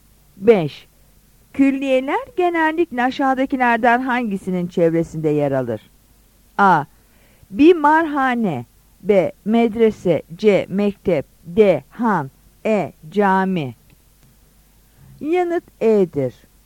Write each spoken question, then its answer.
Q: Külliyeler genellikle aşağıdakilerden hangisinin çevresinde yer alır?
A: Yanıt E'dir.